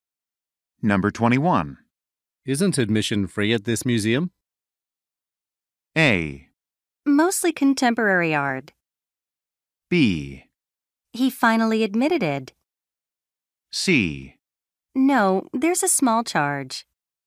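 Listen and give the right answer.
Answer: C: No, there's a small charge.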